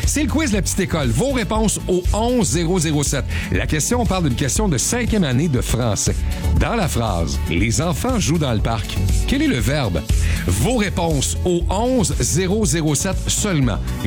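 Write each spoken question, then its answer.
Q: Quel est le verbe?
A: jouent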